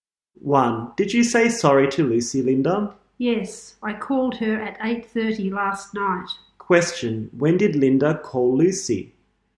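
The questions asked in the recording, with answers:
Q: Question, when did Linda call Lucy?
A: At 8:30 last night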